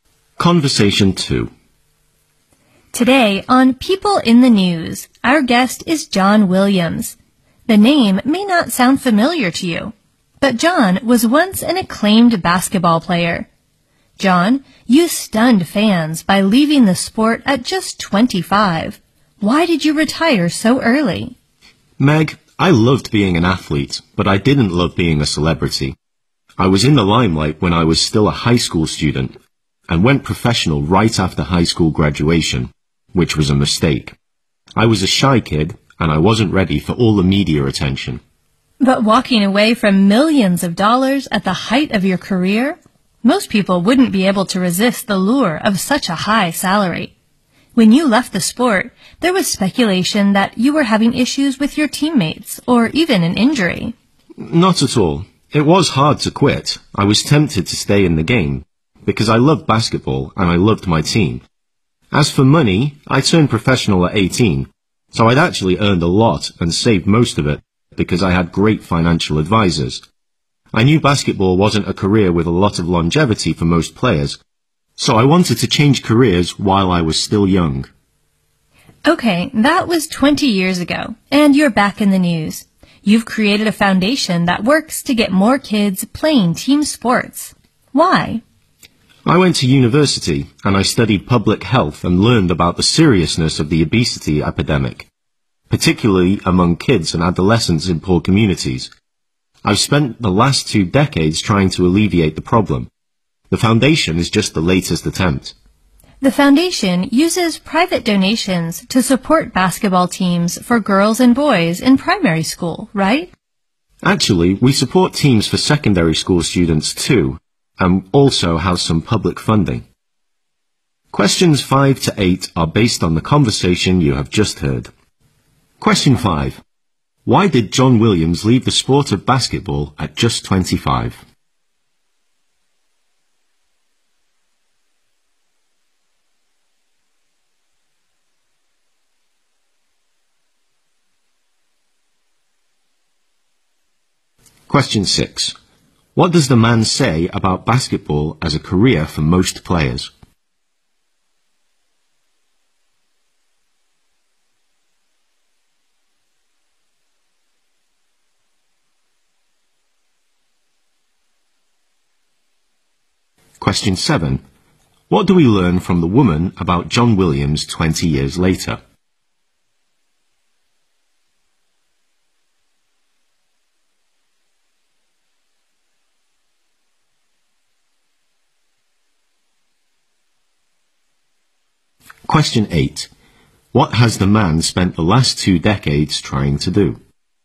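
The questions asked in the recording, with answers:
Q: Why did John Williams leave the sport of basketball at just 25?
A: He loved being an athlete but didn't love being a celebrity.

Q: What does the man say about basketball as a career for most players?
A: It isn't a career with much longevity.

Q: What do we learn from the woman about John Williams 20 years later?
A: He has created a foundation to get more kids playing team sports.

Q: What has the man spent the last two decades trying to do?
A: Alleviate the obesity epidemic among kids and adolescents in poor communities.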